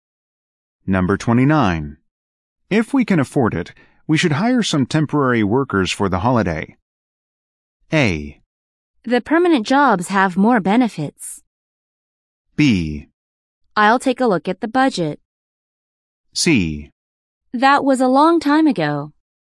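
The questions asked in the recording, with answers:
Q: If we can afford it, we should hire some temporary workers for the holiday.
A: B: I'll take a look at the budget.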